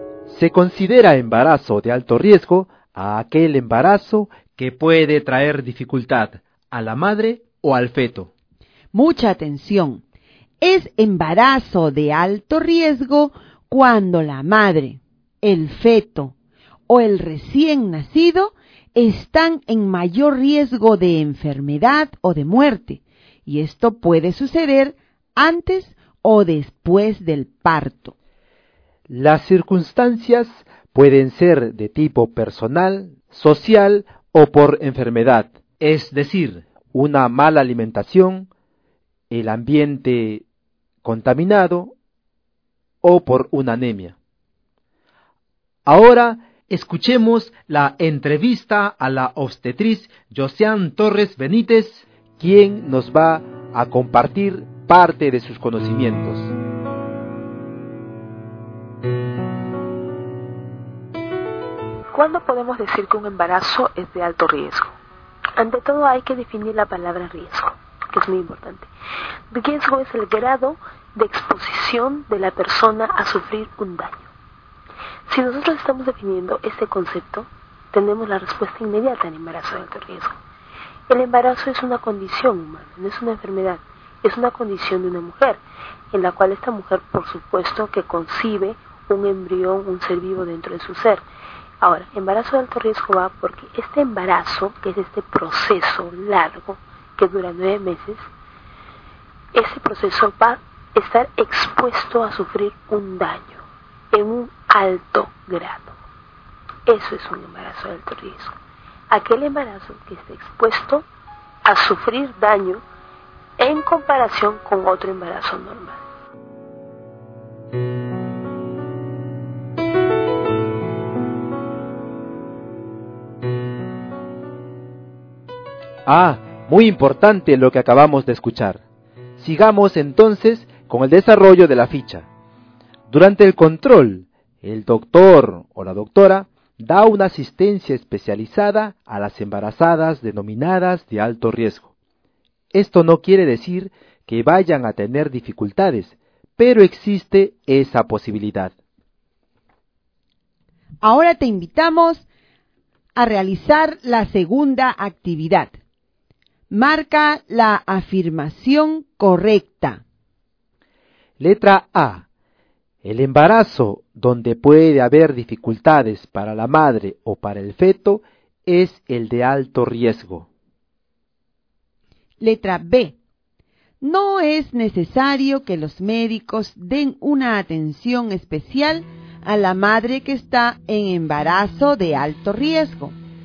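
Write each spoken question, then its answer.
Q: Marca la afirmación correcta.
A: A: El embarazo donde puede haber dificultades para la madre o para el feto es el de alto riesgo.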